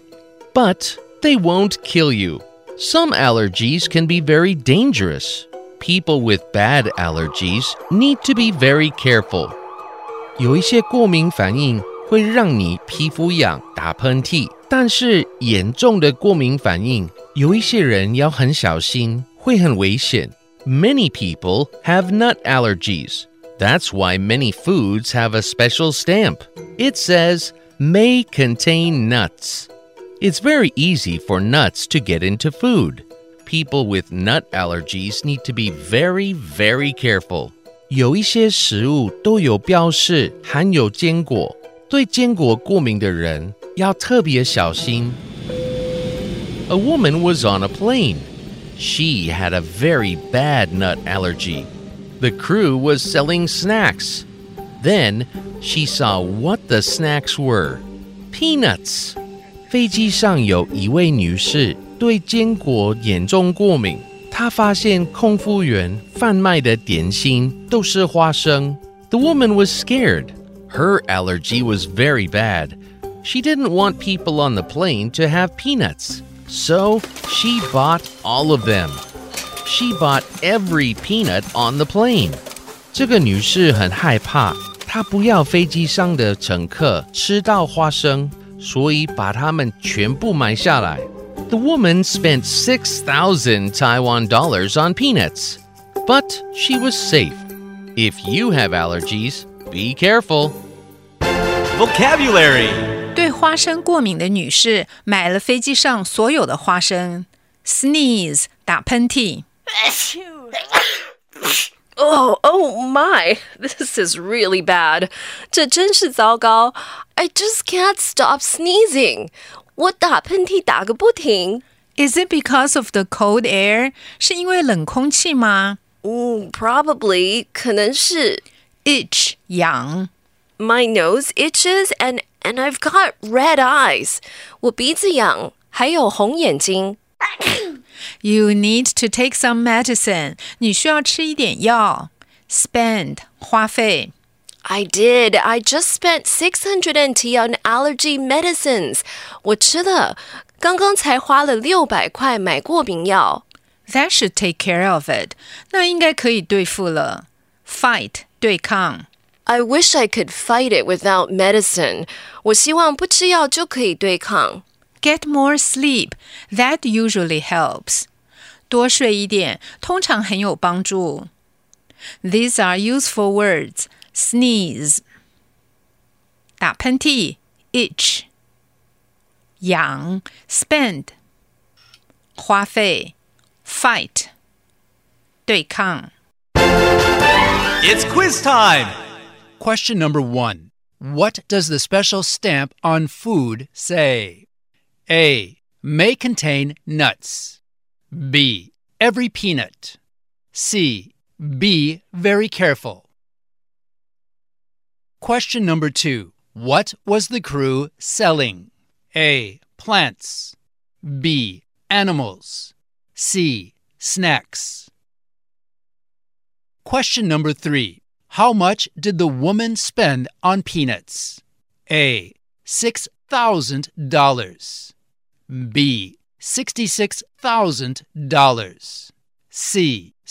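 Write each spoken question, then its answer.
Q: What does the special stamp on food say?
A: A: May contain nuts.

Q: What was the crew selling?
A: C: Snacks.

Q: How much did the woman spend on peanuts?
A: A: $6,000.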